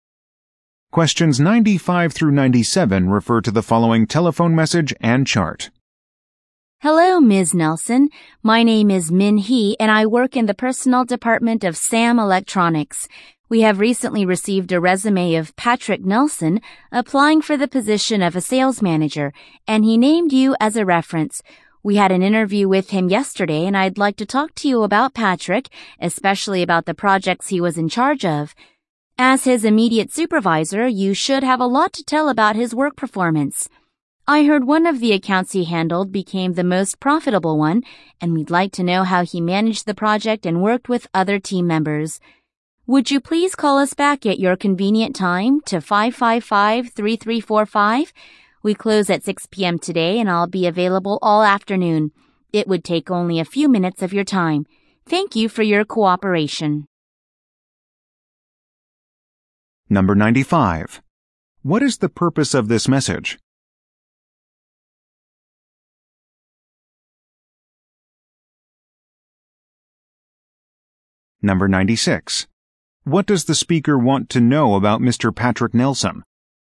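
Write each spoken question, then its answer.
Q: What is the purpose of this message?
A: To check a job applicant's reference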